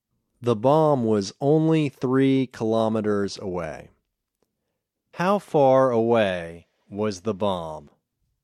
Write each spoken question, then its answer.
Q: How far away was the bomb?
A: The bomb was 3 kilometers away.